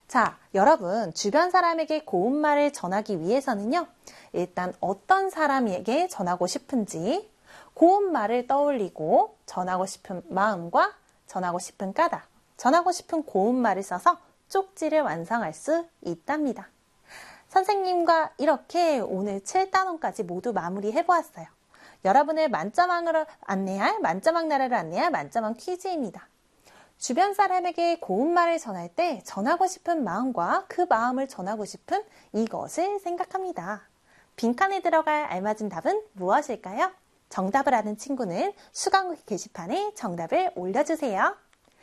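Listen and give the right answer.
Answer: 까닭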